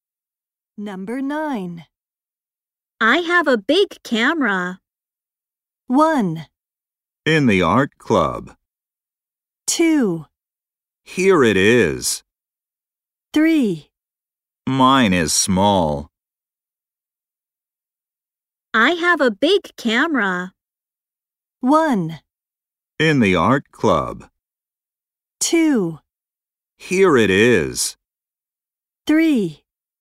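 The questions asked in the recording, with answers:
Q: I have a big camera.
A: 3: Mine is small.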